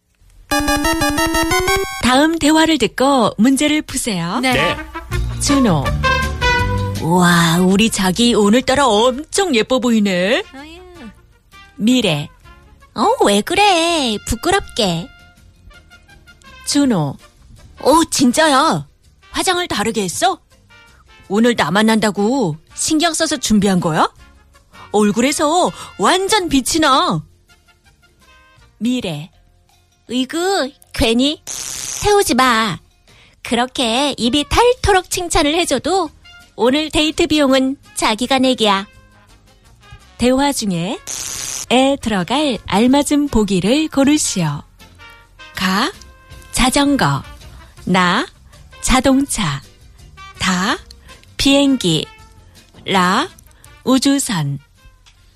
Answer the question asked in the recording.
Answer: da, biengi, airplane.